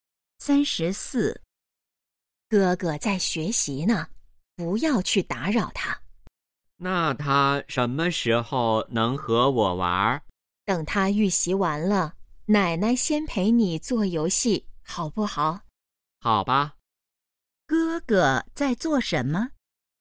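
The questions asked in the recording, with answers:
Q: 哥哥在做什么?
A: 预习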